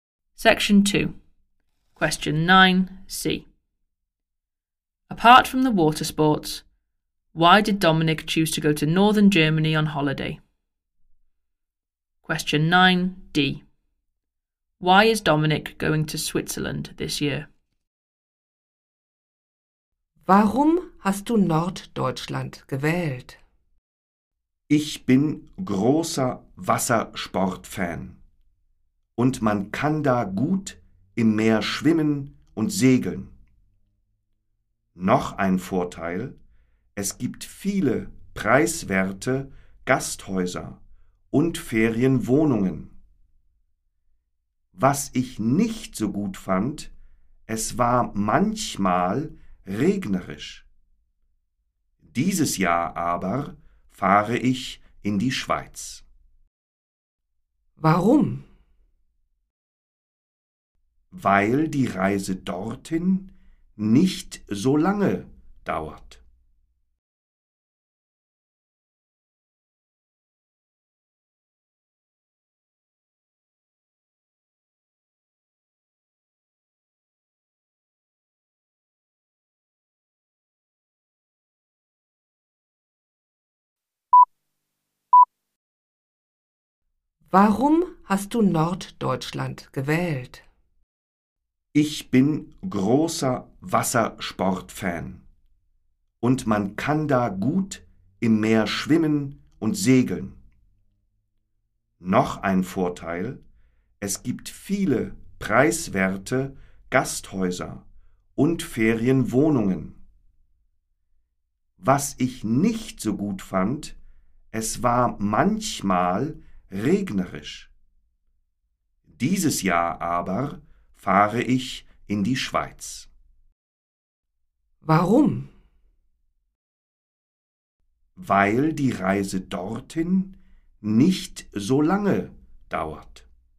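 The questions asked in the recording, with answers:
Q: Apart from the water sports, why did Dominic choose to go to northern Germany on holiday?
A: Many cheap guesthouses and holiday flats

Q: Why is Dominic going to Switzerland this year?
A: The journey there doesn't take so long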